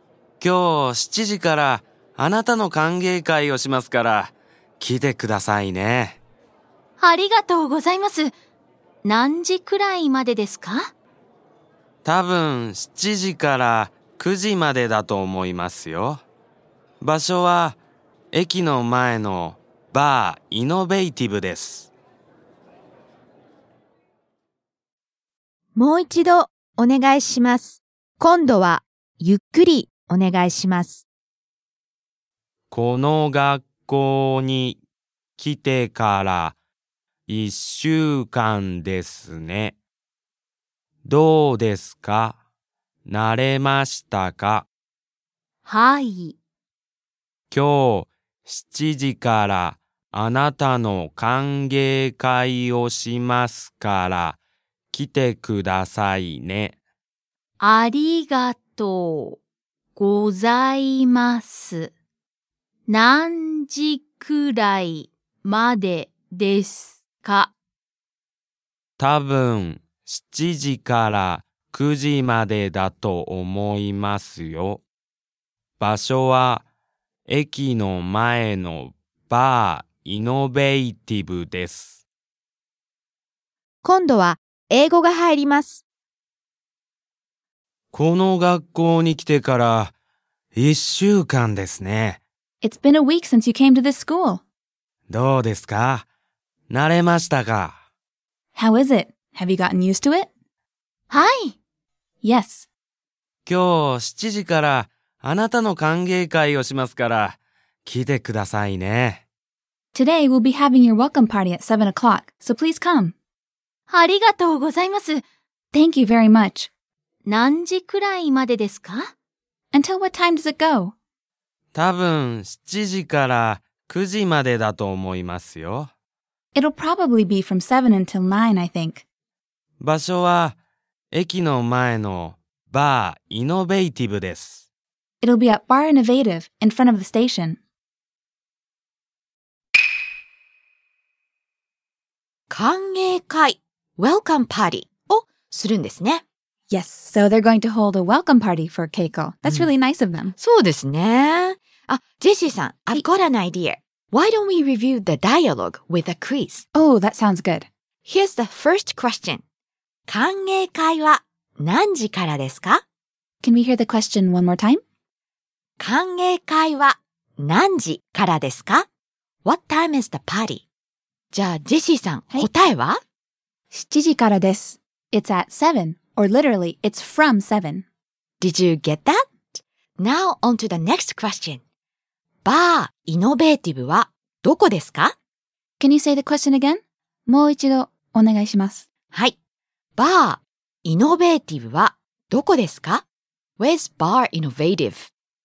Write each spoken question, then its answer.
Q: 歓迎会は何時からですか?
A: 7時からです。It's at 7, or literally, it's from 7.

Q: バー、イノベーティブはどこですか?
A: The answer is, 駅の前です。It's in front of the station.